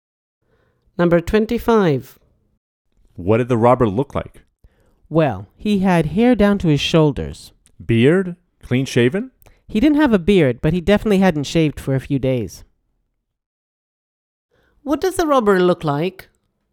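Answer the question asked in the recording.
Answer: shoulder-length hair, no beard, unshaven for a few days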